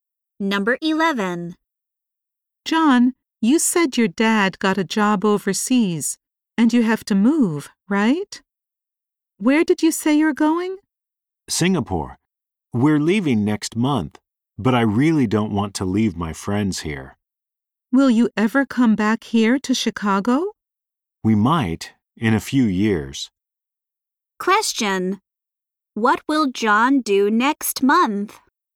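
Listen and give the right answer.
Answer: Move to Singapore.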